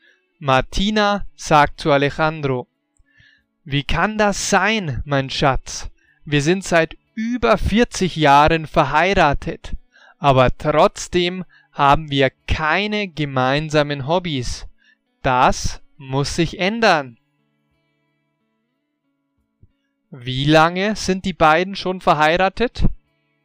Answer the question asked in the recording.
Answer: Seit über 40 Jahren. Sie sind seit über 40 Jahren verheiratet.